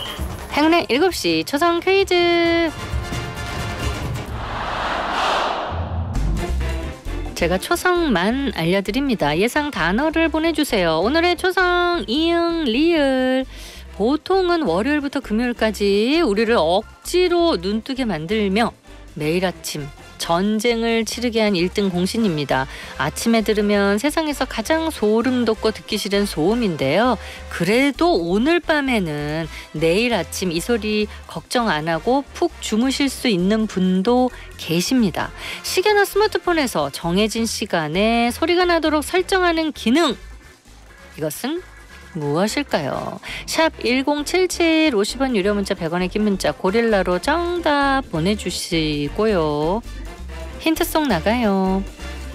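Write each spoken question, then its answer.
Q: 이것은 무엇일까요?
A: 알람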